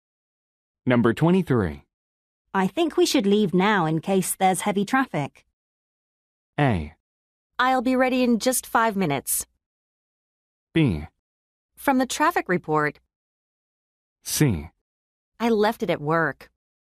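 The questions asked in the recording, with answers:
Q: I think we should leave now in case there's heavy traffic.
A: A: I'll be ready in just 5 minutes.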